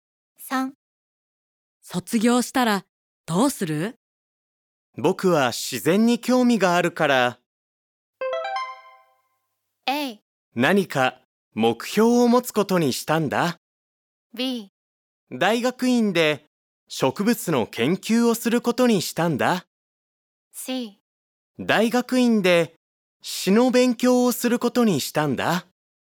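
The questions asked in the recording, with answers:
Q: 卒業したらどうする?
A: B: 大学院で植物の研究をすることにしたんだ。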